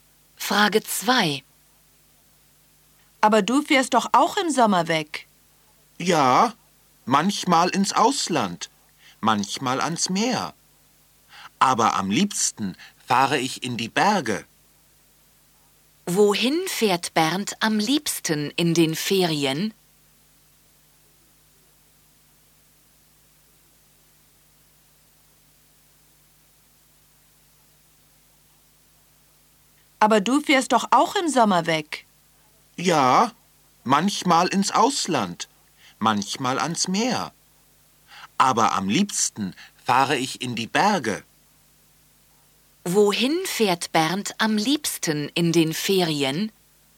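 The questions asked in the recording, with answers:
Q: Wohin fährt Bernd am liebsten in den Ferien?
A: In die Berge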